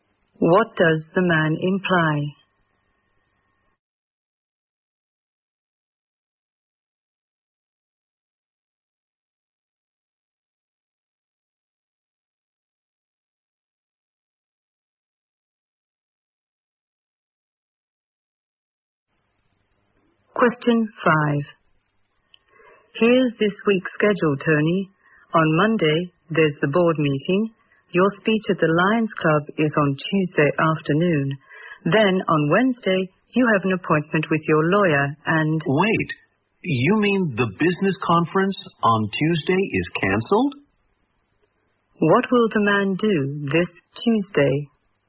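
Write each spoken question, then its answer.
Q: What will the man do this Tuesday?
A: Give a speech at the Lions Club.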